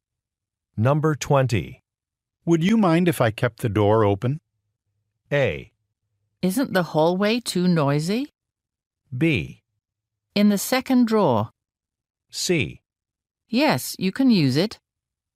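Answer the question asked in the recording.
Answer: A: Isn't the hallway too noisy?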